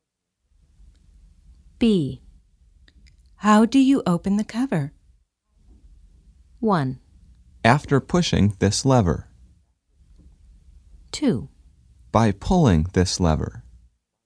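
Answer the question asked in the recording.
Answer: 2: By pulling this lever.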